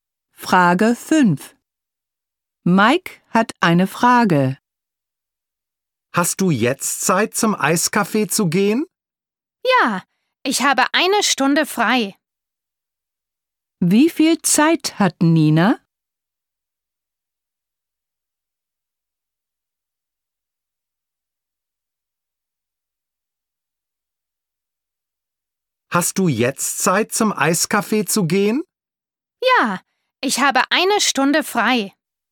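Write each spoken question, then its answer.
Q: Wie viel Zeit hat Nina?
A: Eine Stunde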